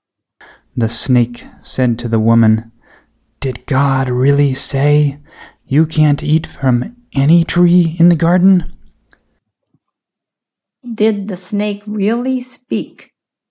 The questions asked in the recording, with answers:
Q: Did the snake really speak?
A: Yes, the snake really spoke.